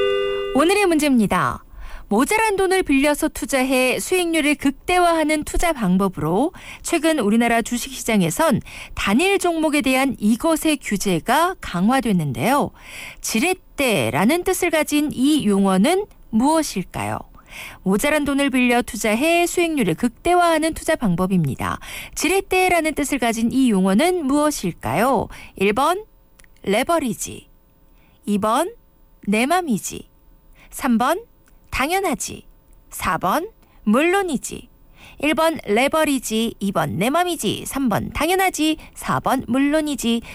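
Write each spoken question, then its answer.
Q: 지렛대라는 뜻을 가진 이 용어는 무엇일까요?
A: 1: 레버리지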